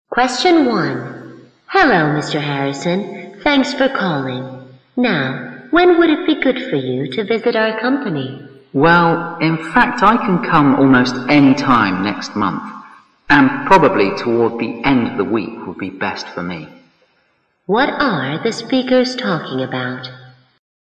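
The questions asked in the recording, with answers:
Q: What are the speakers talking about?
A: Arranging a time for a visit to the company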